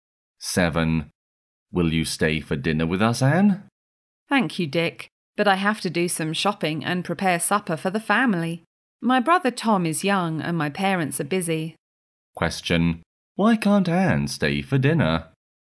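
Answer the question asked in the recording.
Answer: She has to do some shopping and prepare supper for her family.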